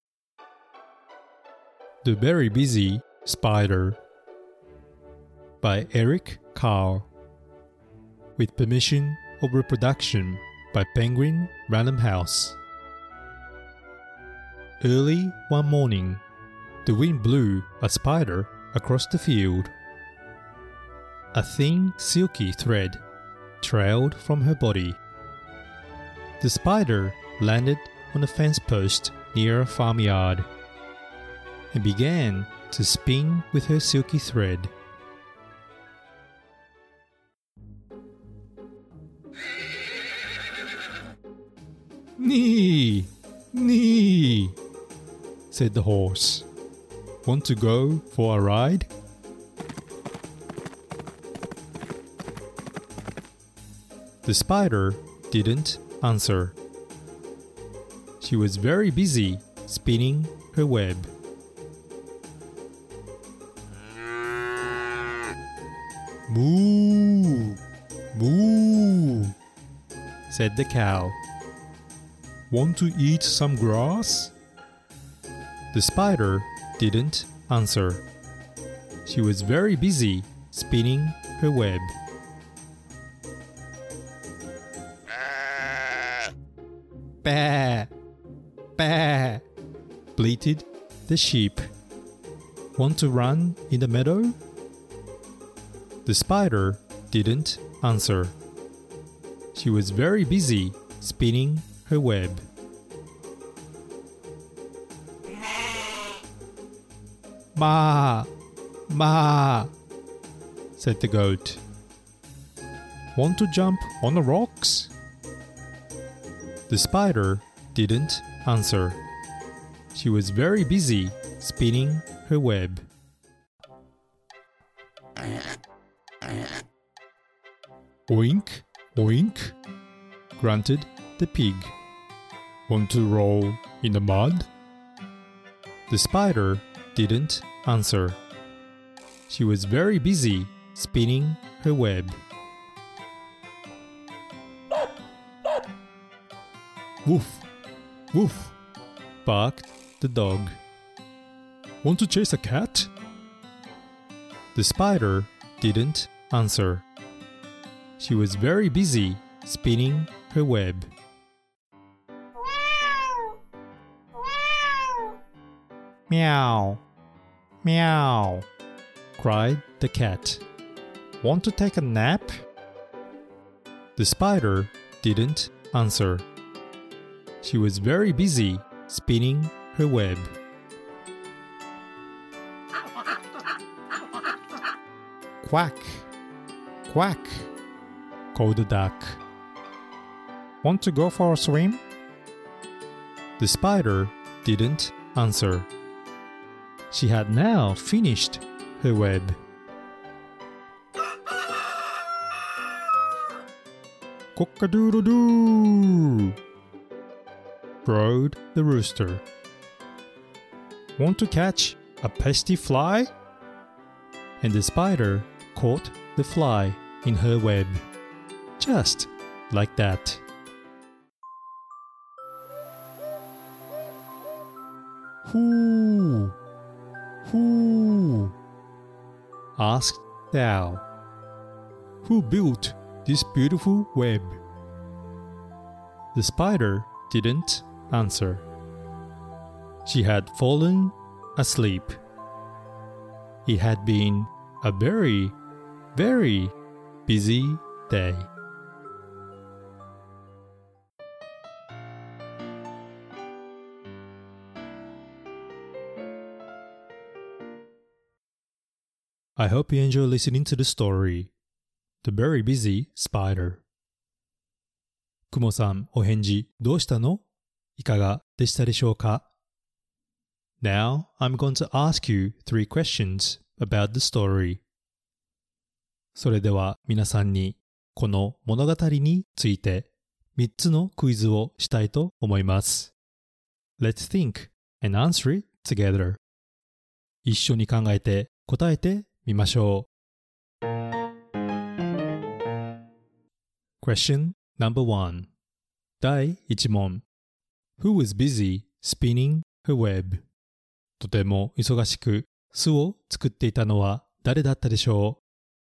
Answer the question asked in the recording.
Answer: The answer is He was a spider.